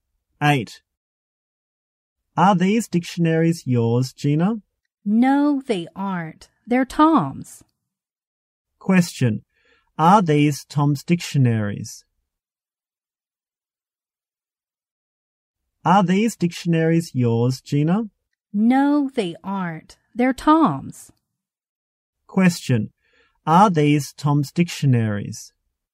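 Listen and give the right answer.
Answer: Yes, they are.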